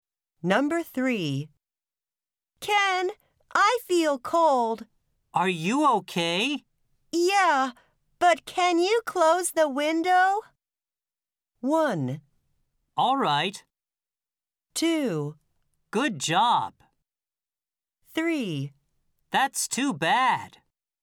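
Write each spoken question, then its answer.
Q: Yeah, but can you close the window?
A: 1: All right.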